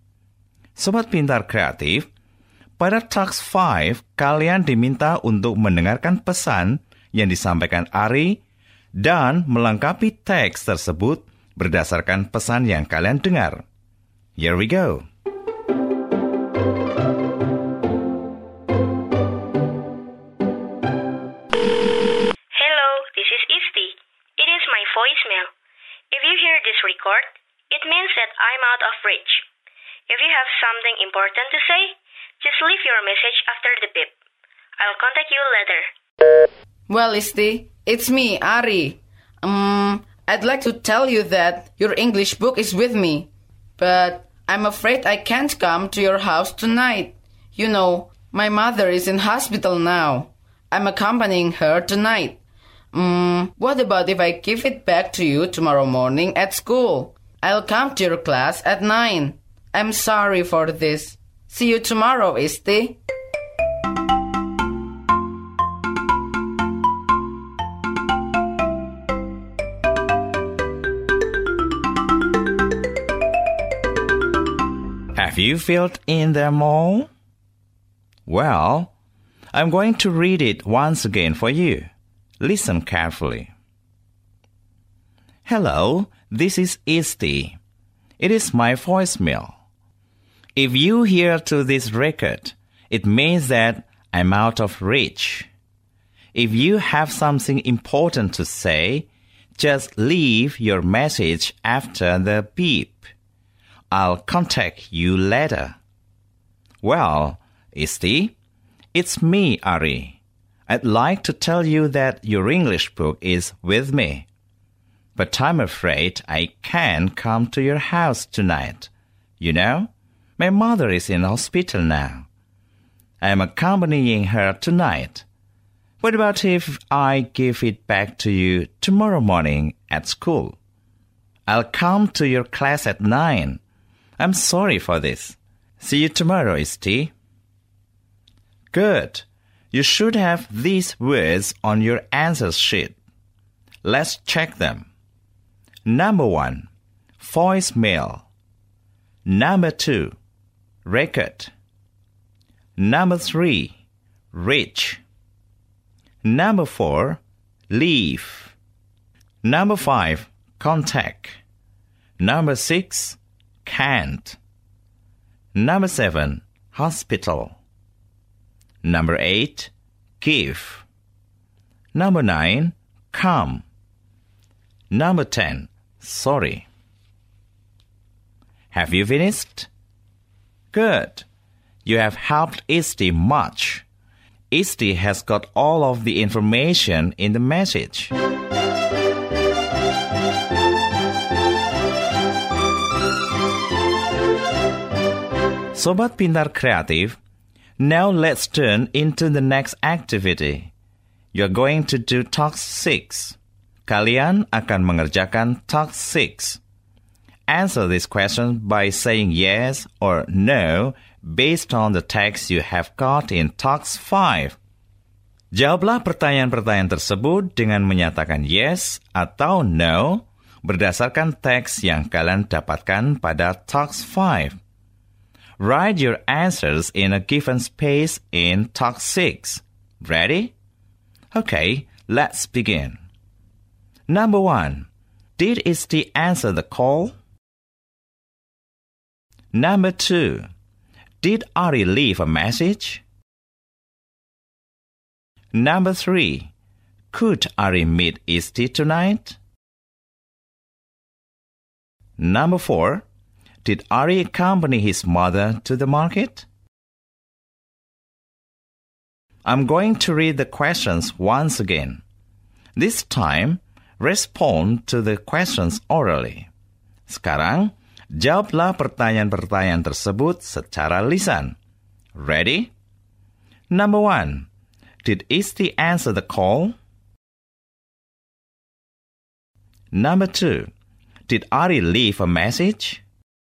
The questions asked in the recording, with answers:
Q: Did Isti answer the call?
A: No.

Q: Did Ari leave a message?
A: Yes.

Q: Could Ari meet Isti tonight?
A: No.